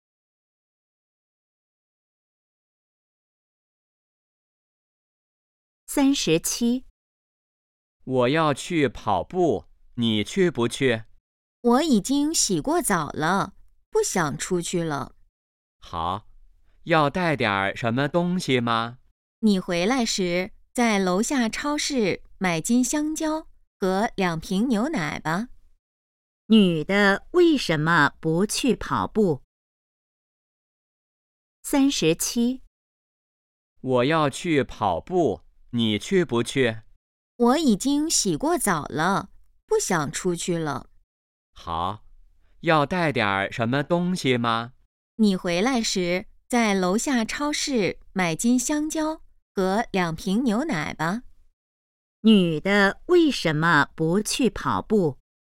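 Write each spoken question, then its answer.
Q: 女的为什么不去跑步?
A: 已经洗过澡了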